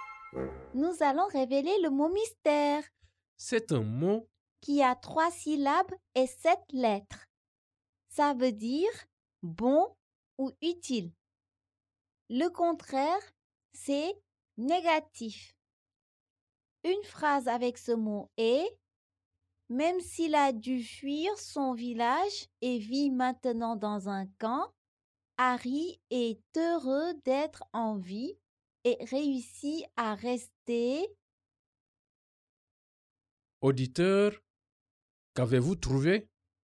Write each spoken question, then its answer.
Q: Auditeur, qu'avez-vous trouvé?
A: Le mot mystère est positif.